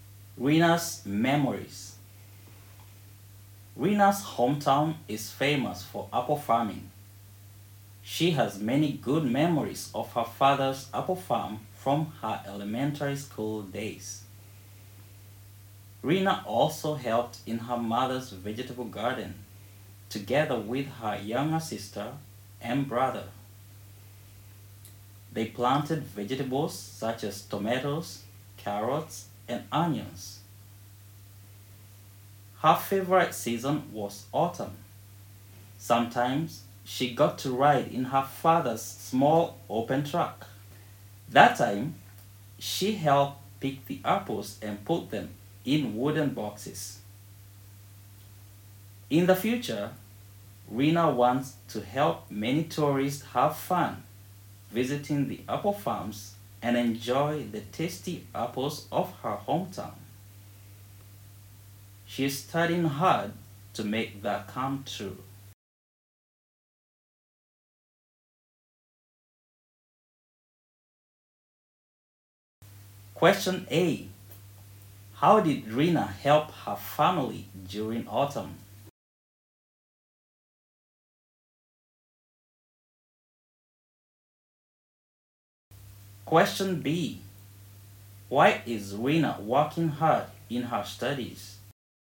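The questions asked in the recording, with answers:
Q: How did Rina help her family during autumn?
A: She helped pick the apples and put them in wooden boxes

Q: Why is Rina working hard in her studies?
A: She wants to help many tourists have fun visiting the apple farms and enjoy the apples of her hometown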